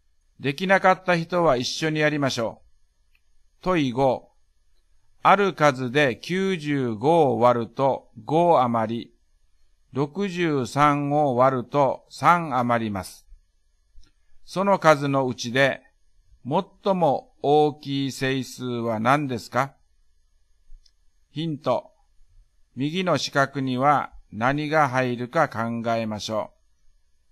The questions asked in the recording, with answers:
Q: ある数で95を割ると5余り、63を割ると3余ります。 その数のうちで、最も大きい整数は何ですか?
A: 90と60の最大公約数は30です。30が答えです。